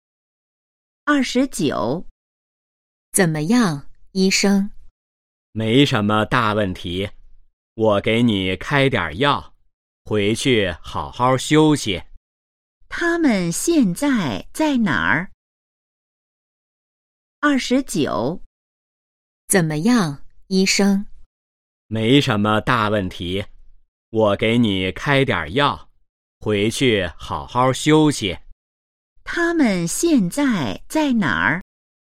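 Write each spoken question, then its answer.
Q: 他们现在在哪儿?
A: 医院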